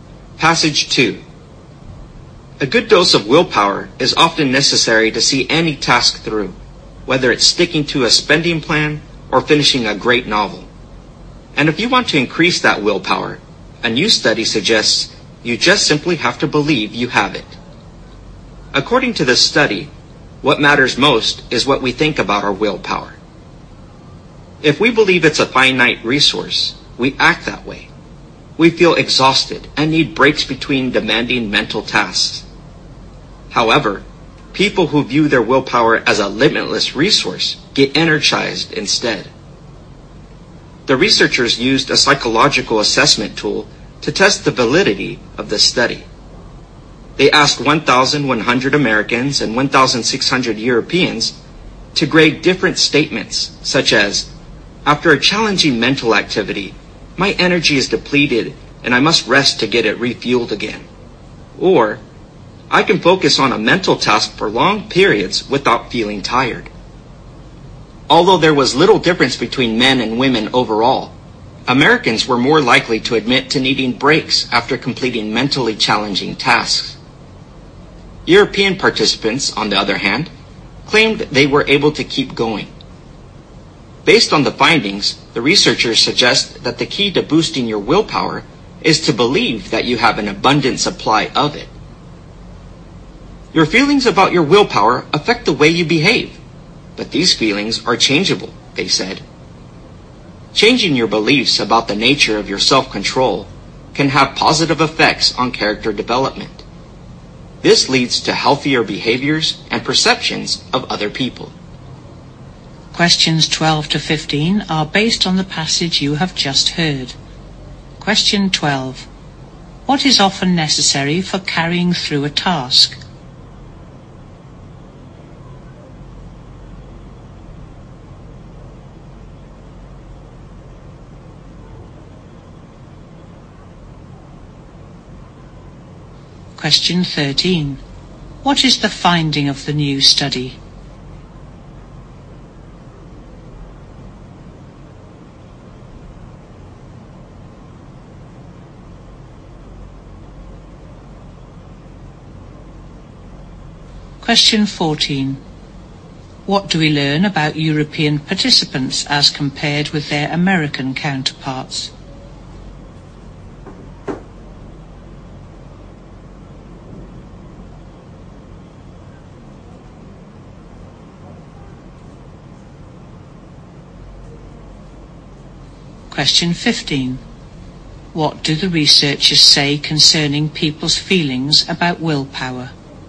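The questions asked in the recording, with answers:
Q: What is often necessary for carrying through a task?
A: Willpower

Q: What is the finding of the new study?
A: What matters most is what we believe about our willpower

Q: What do we learn about European participants as compared with their American counterparts?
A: They said they could keep going without breaks after mentally challenging tasks

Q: What do the researchers say concerning people's feelings about willpower?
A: They affect how people behave and can be changed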